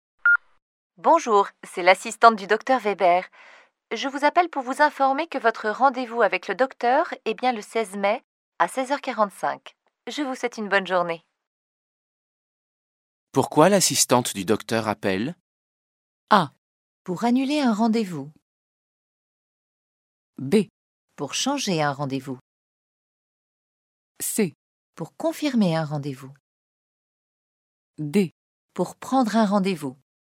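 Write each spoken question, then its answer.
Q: Pourquoi l'assistante du docteur appelle?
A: C: Pour confirmer un rendez-vous.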